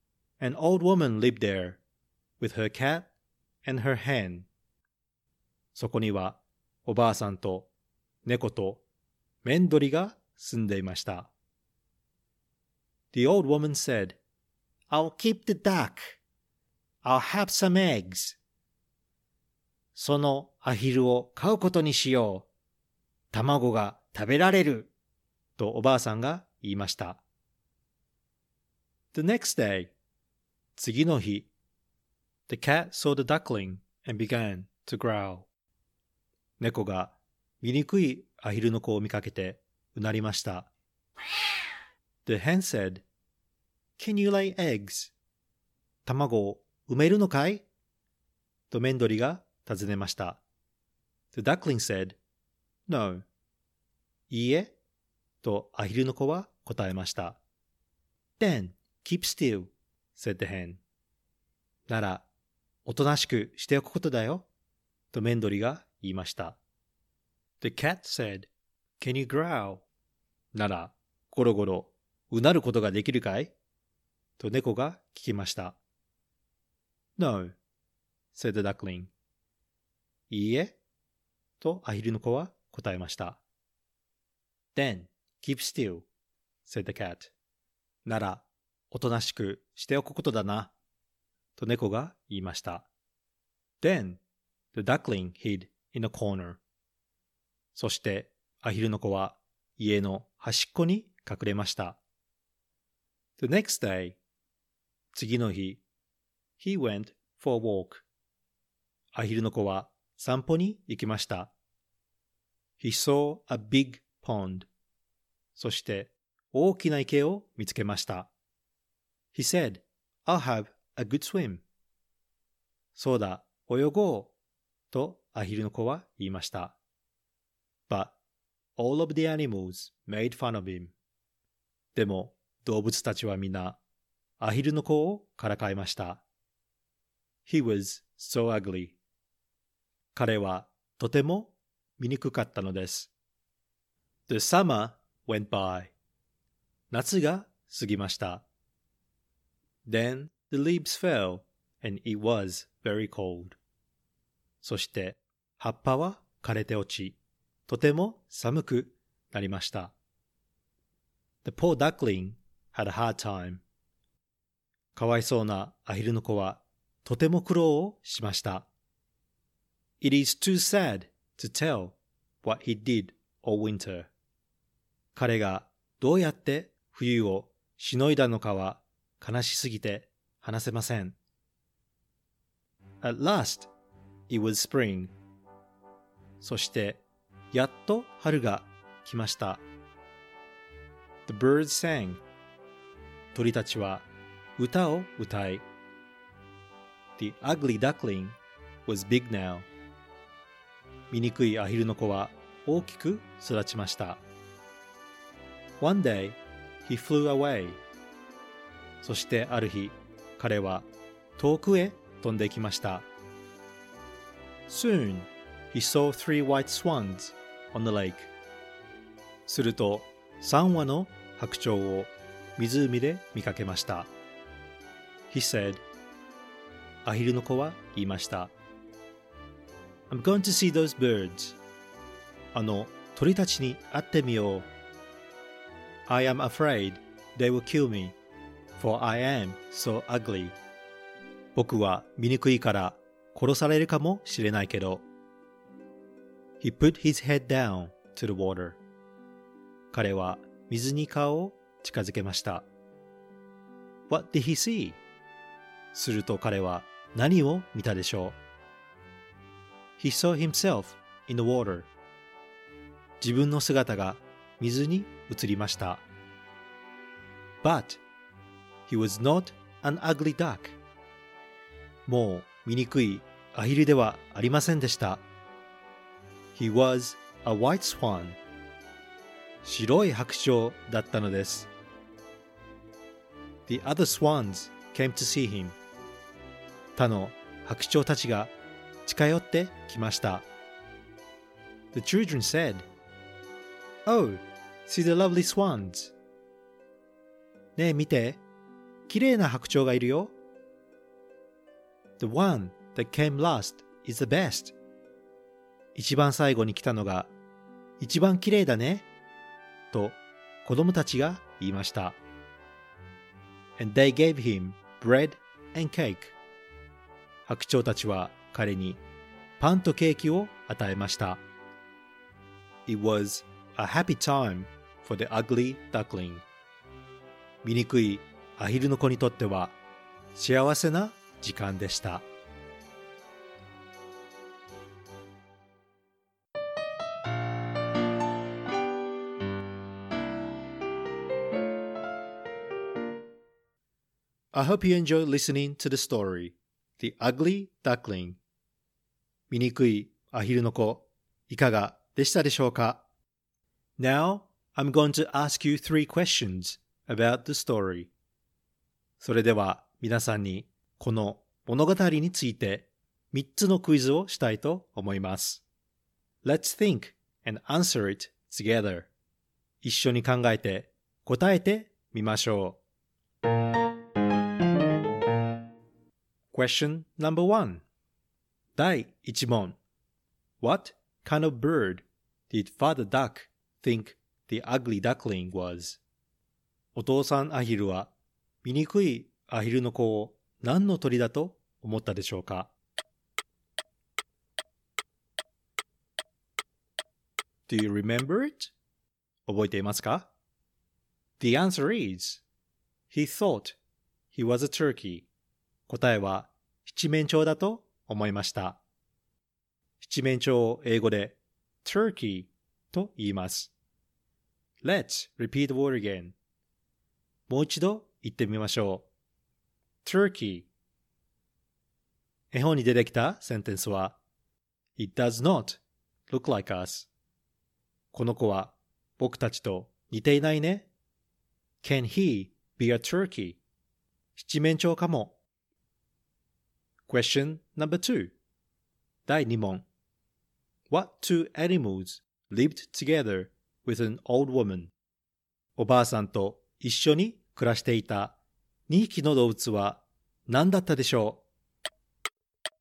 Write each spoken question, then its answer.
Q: What two animals lived together with an old woman?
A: The answer is a cat and a hen.